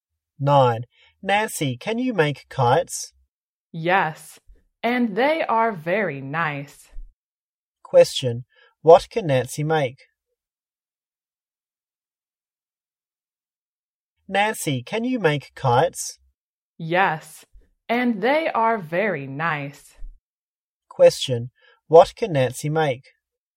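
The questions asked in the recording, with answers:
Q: what can Nancy make?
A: kites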